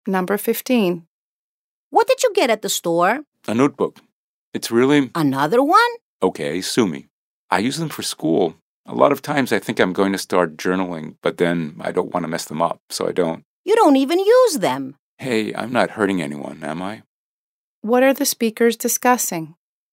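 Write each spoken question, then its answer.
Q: What are the speakers discussing?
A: A notebook one speaker bought, and her habit of buying notebooks she doesn't use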